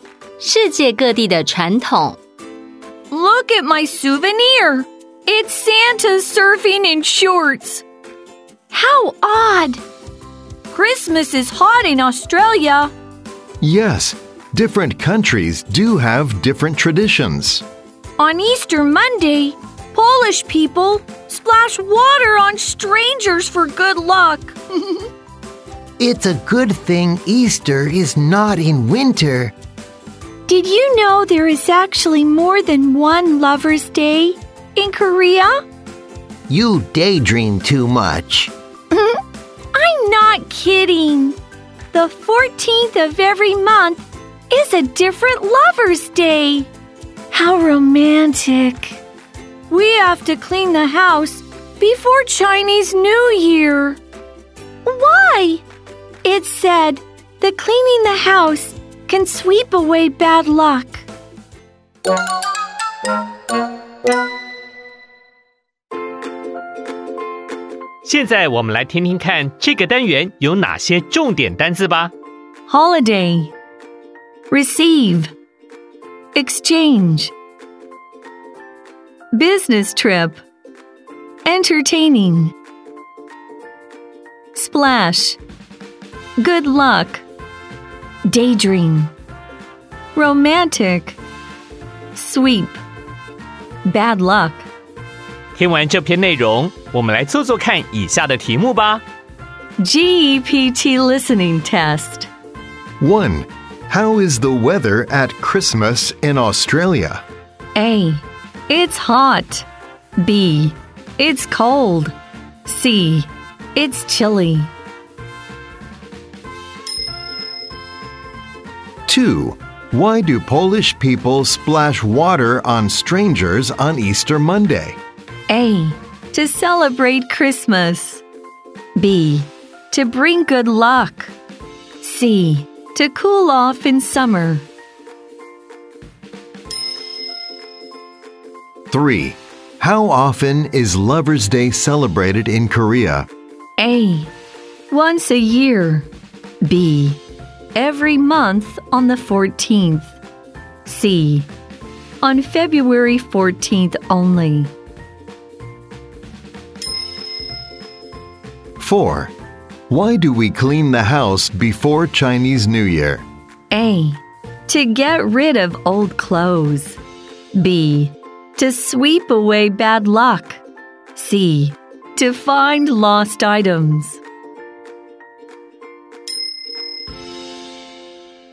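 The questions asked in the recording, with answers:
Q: How is the weather at Christmas in Australia?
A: A: It's hot.

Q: Why do Polish people splash water on strangers on Easter Monday?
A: B: To bring good luck.

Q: How often is Lover's Day celebrated in Korea?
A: B: Every month on the 14th.

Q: Why do we clean the house before Chinese New Year?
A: B: To sweep away bad luck.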